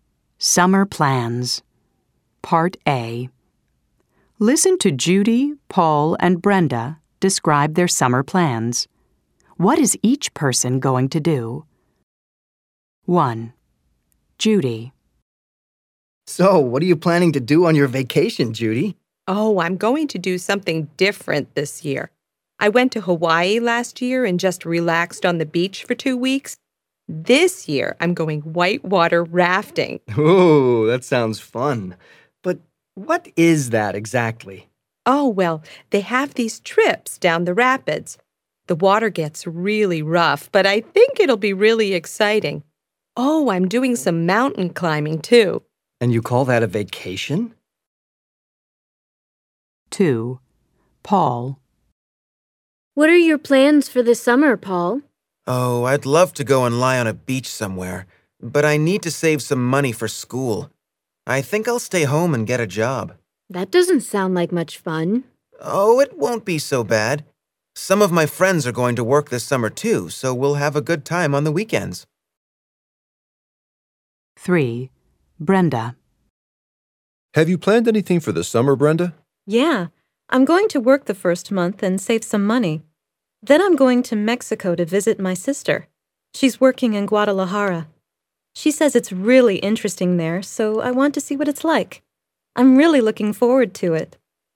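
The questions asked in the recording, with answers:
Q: What is each person going to do? 1. Judy.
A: Go whitewater rafting and mountain climbing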